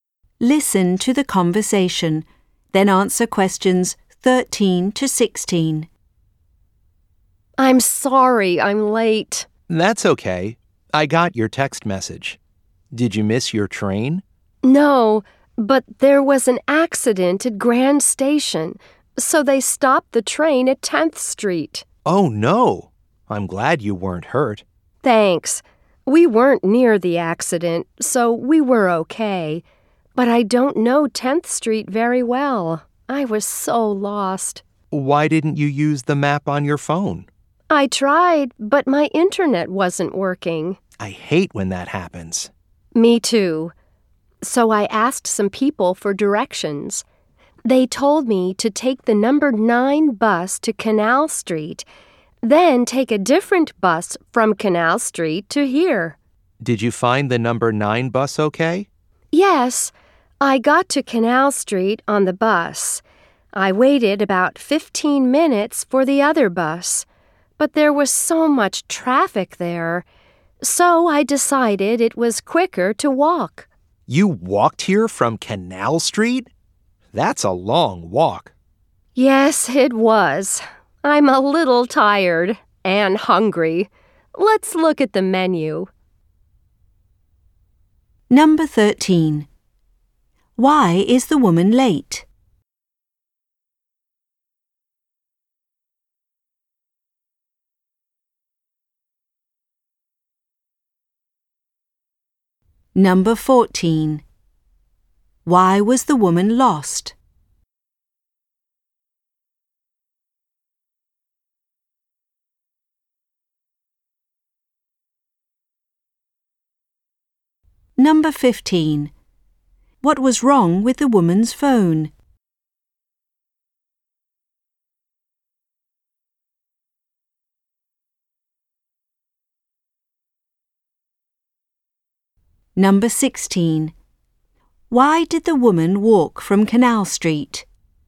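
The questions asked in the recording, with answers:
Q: Why is the woman late?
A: An accident at Grand Station stopped her train

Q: Why was the woman lost?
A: She didn't know 10th Street well

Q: What was wrong with the woman's phone?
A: Her internet wasn't working

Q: Why did the woman walk from Canal Street?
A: There was so much traffic that walking was quicker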